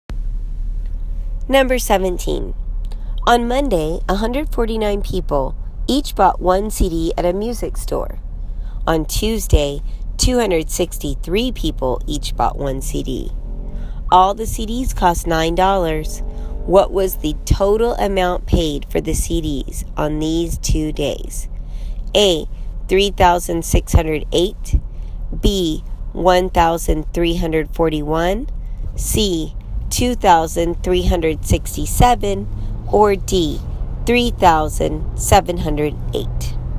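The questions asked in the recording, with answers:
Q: All the CDs cost $9. What was the total amount paid for the CDs on these 2 days?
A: D: $3,708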